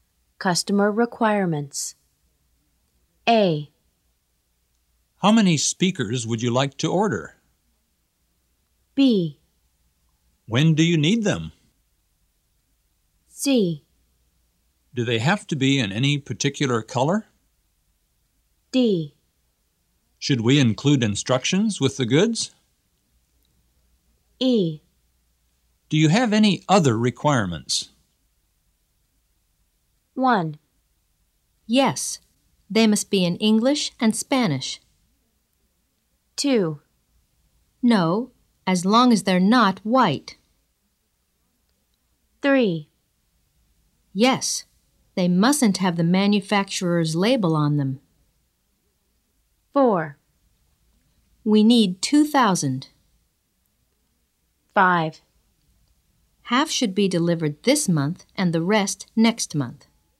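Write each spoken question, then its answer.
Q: How many speakers would you like to order?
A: 4: We need 2,000.

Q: When do you need them?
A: 5: Half should be delivered this month and the rest next month.

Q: Do they have to be in any particular color?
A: 2: No, as long as they're not white.

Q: Should we include instructions with the goods?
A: 1: Yes, they must be in English and Spanish.

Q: Do you have any other requirements?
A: 3: Yes, they mustn't have the manufacturer's label on them.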